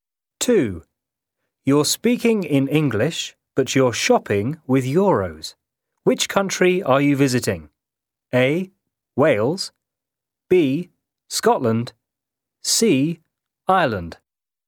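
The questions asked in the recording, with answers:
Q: Which country are you visiting?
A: C: Ireland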